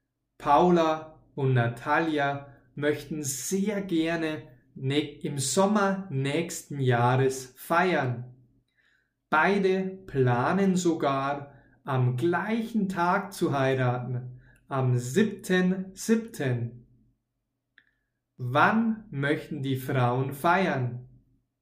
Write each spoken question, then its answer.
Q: Wann möchten die Frauen feiern?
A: Im Sommer nächsten Jahres.